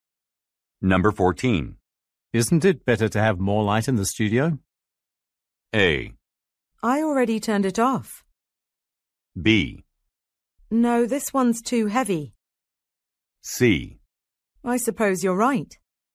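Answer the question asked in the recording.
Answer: C: I suppose you're right.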